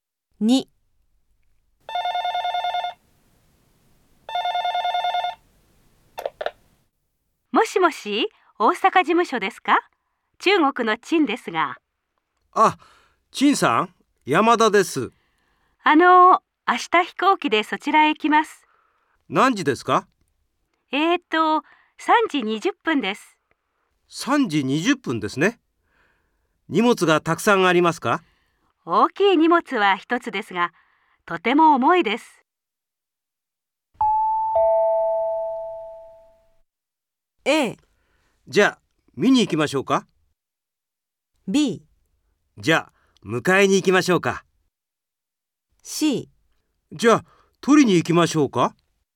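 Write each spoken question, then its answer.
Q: 大きい荷物は一つですが、とても重いです。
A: B: じゃあ迎えに行きましょうか。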